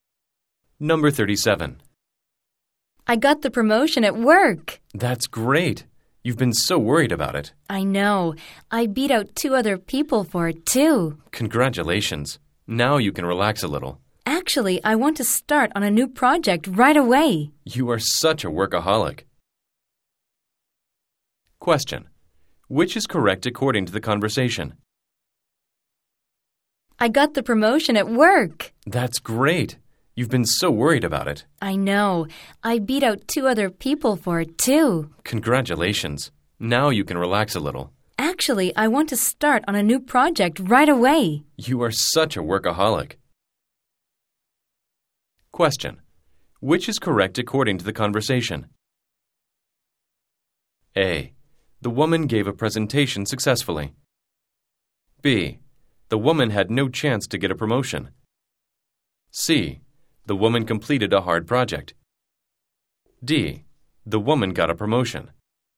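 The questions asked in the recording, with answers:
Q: Which is correct according to the conversation?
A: D: The woman got a promotion.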